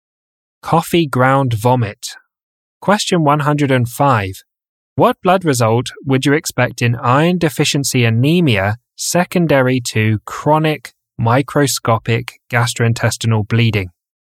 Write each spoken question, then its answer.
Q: What blood result would you expect in iron deficiency anemia secondary to chronic microscopic gastrointestinal bleeding?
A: A low hemoglobin, low mean corpuscular volume or MCV, and low ferritin.